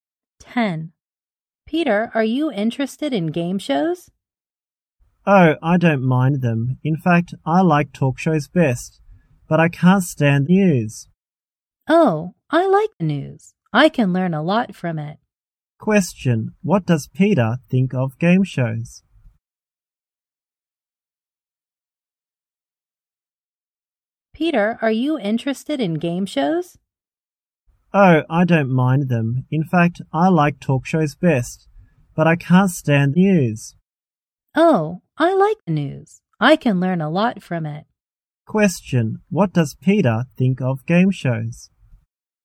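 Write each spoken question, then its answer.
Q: What does Peter think of game shows?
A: He doesn't mind them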